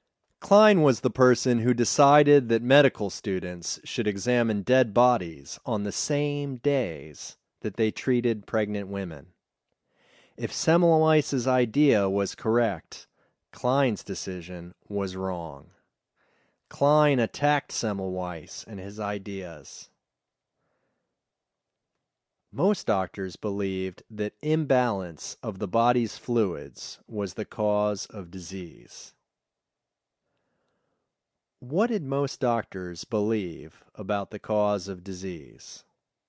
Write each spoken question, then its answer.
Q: What did most doctors believe about the cause of disease?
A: Most doctors believed that imbalance of the body's fluids was the cause of disease.